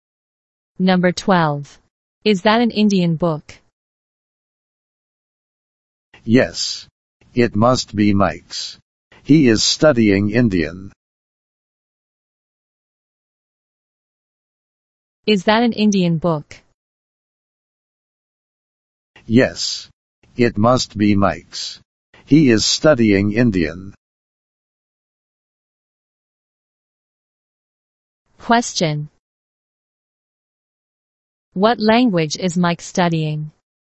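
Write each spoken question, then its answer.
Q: What language is Mike studying?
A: Indian.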